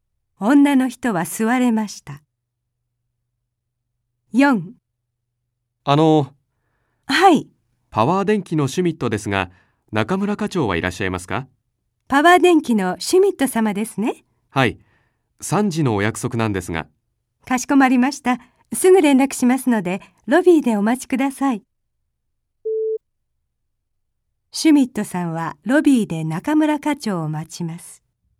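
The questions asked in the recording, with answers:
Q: シュミットさんはロビーで中村課長を待ちます。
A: はい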